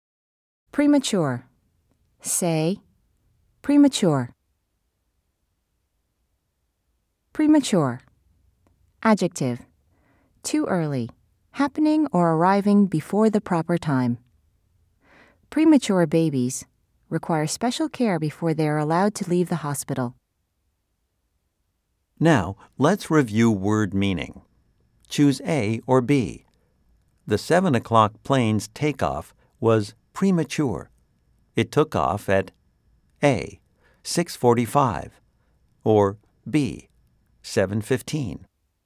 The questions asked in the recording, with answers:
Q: Choose A or B. The 7 o'clock plane's takeoff was premature.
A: If you said A, you are right.